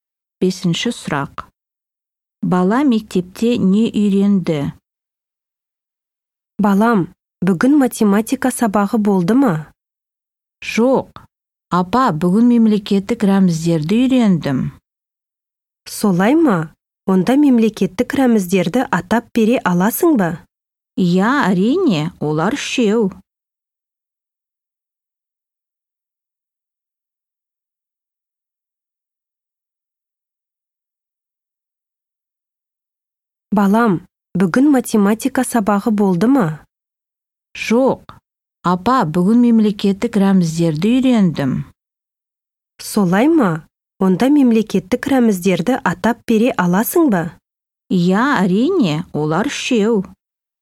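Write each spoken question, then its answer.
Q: Бала мектепте не үйренді?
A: мемлекеттік рәміздерді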